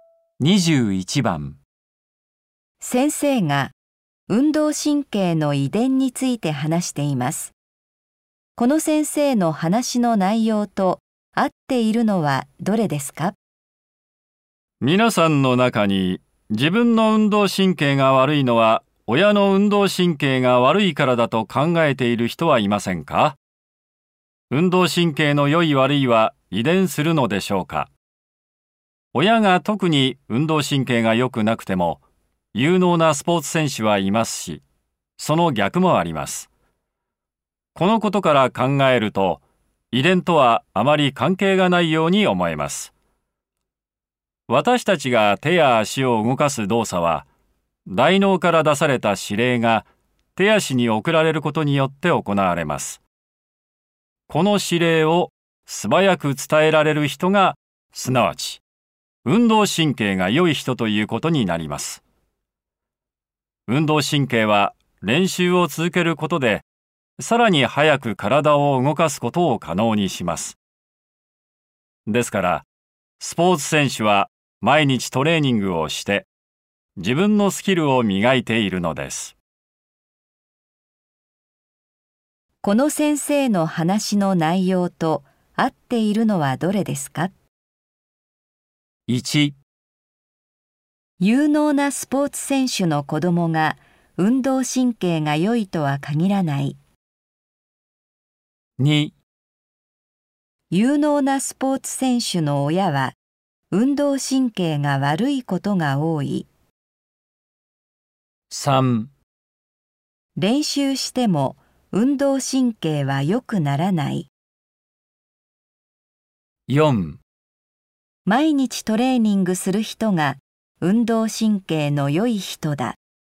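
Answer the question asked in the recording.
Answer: 1: 有能なスポーツ選手の子供が運動神経が良いとは限らない。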